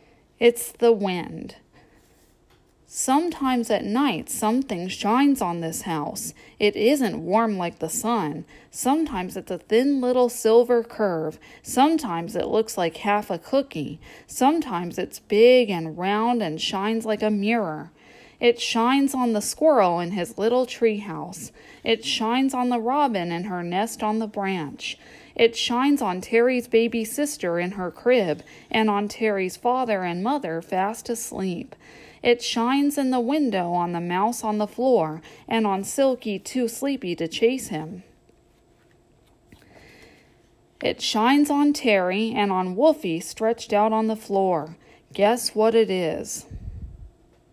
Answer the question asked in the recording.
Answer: It's the moon.